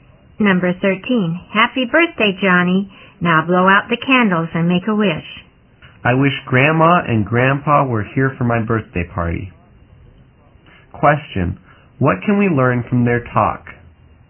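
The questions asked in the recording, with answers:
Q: Question, what can we learn from their talk?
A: Johnny's grandparents are not at his birthday party.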